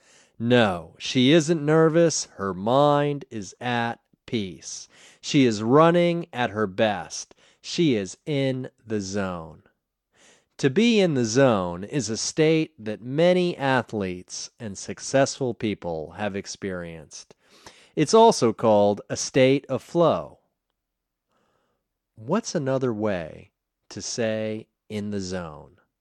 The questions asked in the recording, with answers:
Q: What's another way to say in the zone?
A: A state of flow is another way to say in the zone.